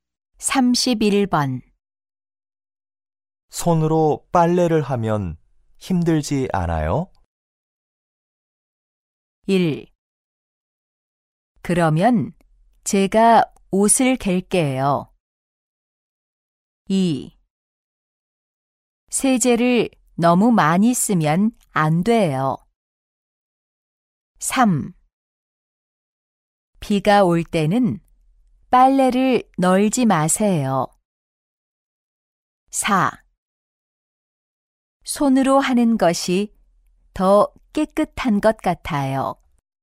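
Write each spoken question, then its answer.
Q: 손으로 빨래를 하면 힘들지 않아요?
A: 4: 손으로 하는 것이 더 깨끗한 것 같아요.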